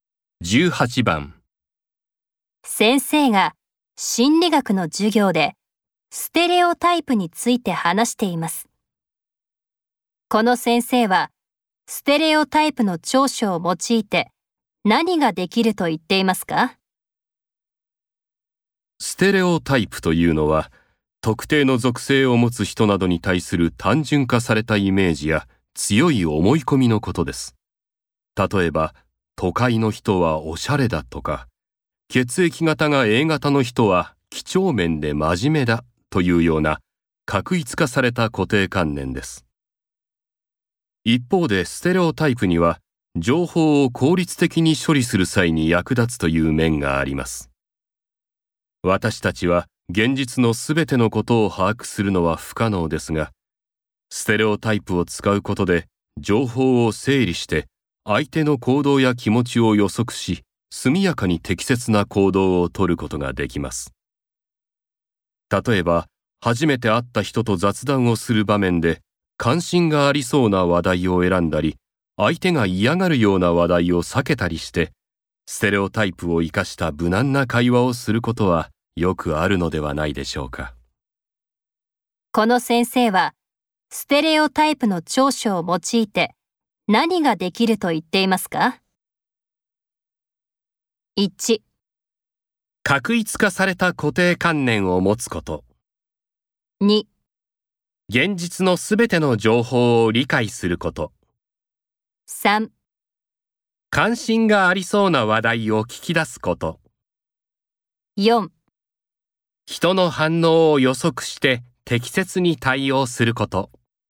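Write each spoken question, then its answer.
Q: この先生はステレオタイプの長所を用いて何ができると言っていますか?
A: 4: 人の反応を予測して適切に対応すること。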